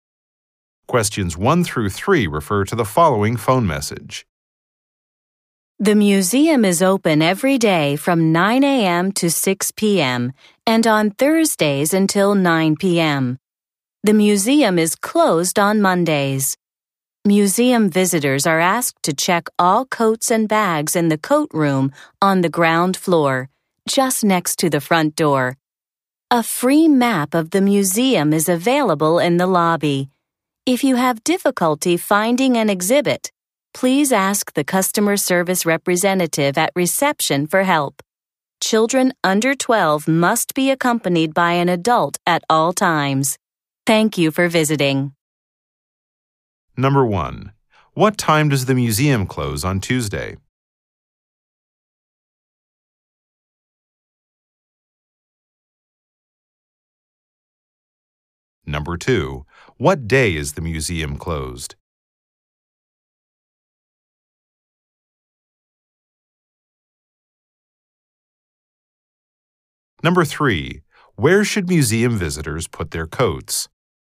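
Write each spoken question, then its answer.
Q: What time does the museum close on Tuesday?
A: 6 p.m.

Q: What day is the museum closed?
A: Monday

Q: Where should museum visitors put their coats?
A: In the coat room on the ground floor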